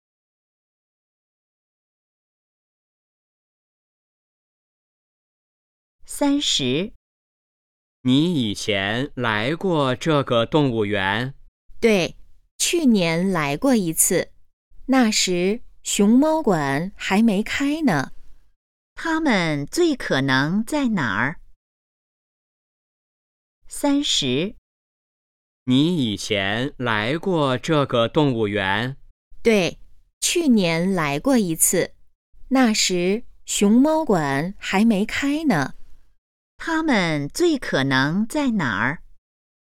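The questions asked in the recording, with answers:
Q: 他们最可能在哪儿?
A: 动物园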